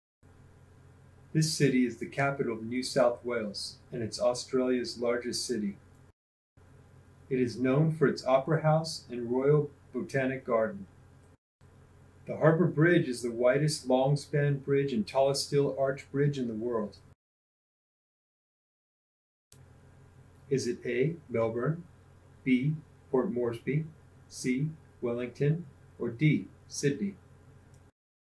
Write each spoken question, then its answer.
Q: Is it A, Melbourne, B, Port Moresby, C, Wellington, or D, Sydney?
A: If you chose Sydney, you're correct.